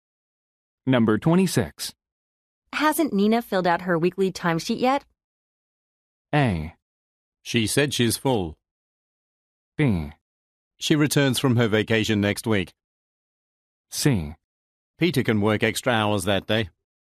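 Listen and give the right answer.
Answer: B: She returns from her vacation next week.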